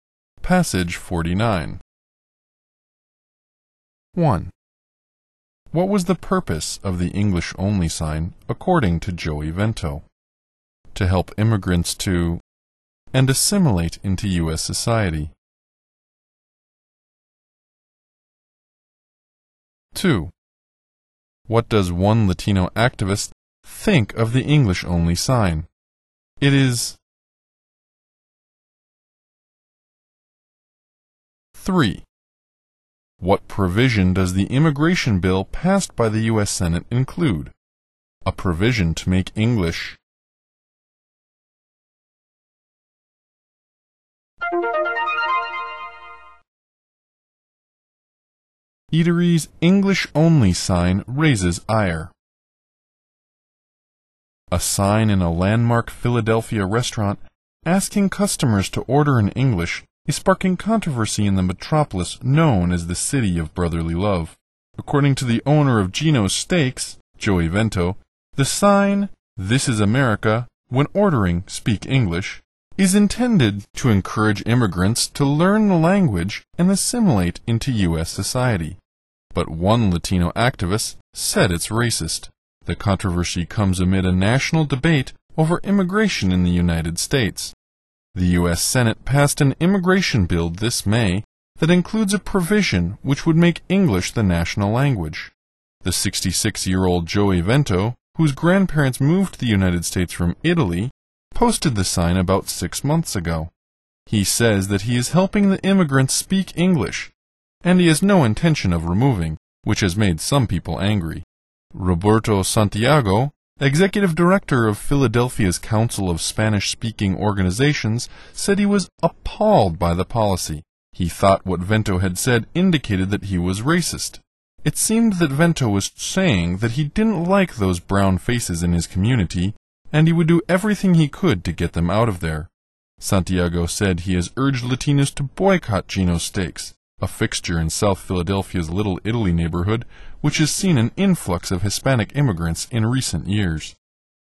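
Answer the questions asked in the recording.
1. To encourage immigrants to learn the language and assimilate into U.S. society
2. It is racist
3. A provision to make English the national language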